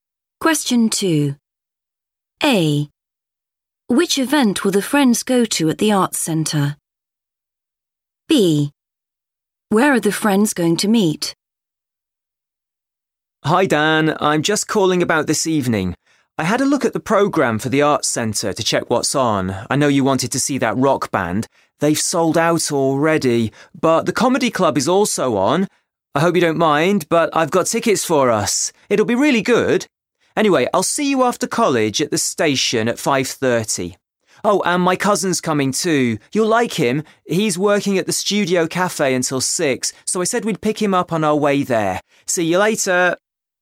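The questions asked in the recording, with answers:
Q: Which event will the friends go to at the Arts Centre?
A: the comedy club

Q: Where are the friends going to meet?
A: at the station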